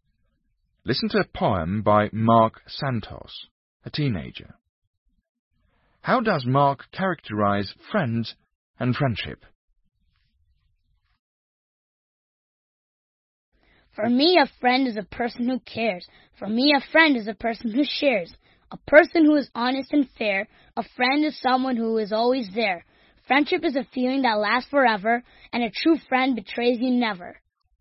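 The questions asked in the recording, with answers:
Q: How does Mark characterize friends and friendship?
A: A friend cares, shares, is honest and fair, and is always there; friendship lasts forever and a true friend never betrays you.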